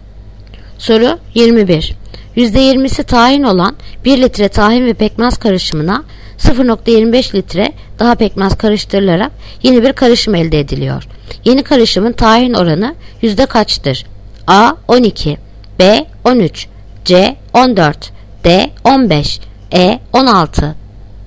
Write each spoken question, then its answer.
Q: Yeni karışımın tahin oranı yüzde kaçtır?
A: Yanıt Edirne 16.